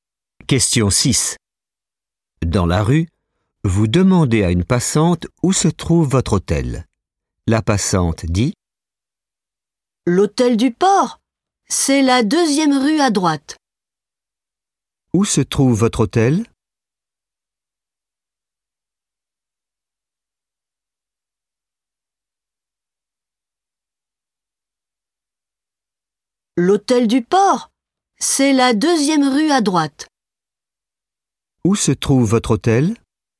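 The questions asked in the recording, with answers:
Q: Où se trouve votre hôtel ?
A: La deuxième rue à droite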